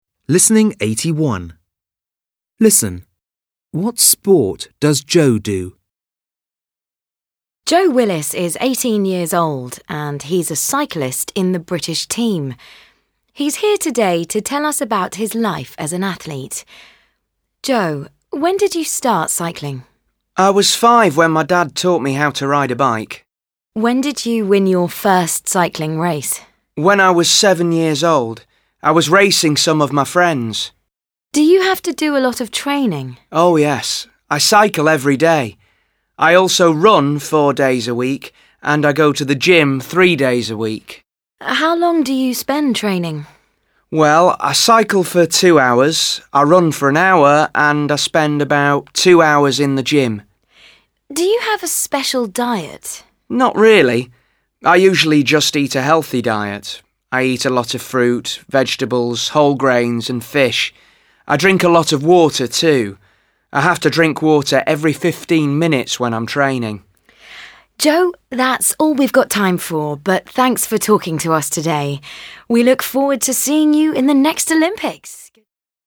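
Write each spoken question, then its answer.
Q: What sport does Joe do?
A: Cycling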